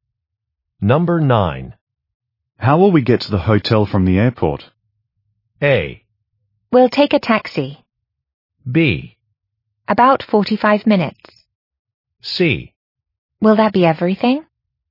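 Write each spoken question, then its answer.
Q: How will we get to the hotel from the airport?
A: A: We'll take a taxi.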